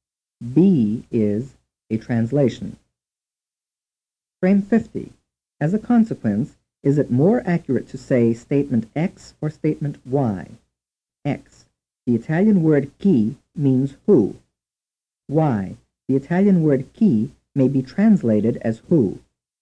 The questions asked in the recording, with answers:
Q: As a consequence, is it more accurate to say statement X or statement Y?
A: The answer is statement Y.